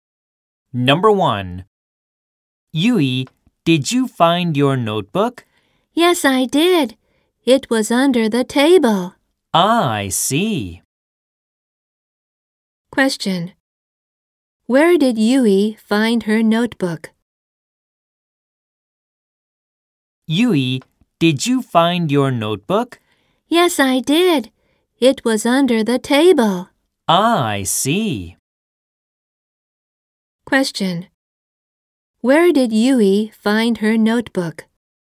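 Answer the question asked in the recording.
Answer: Under the table.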